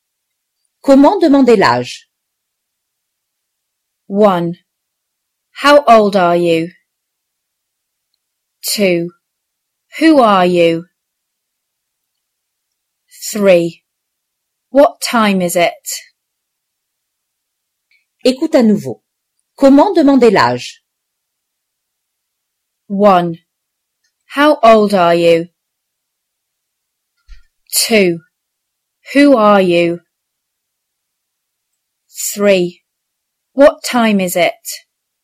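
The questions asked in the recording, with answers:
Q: Comment demander l'âge?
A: 1: How old are you?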